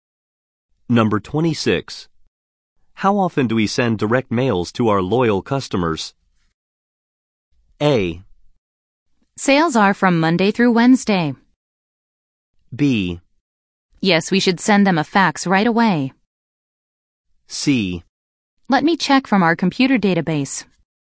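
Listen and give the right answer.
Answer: C: Let me check from our computer database.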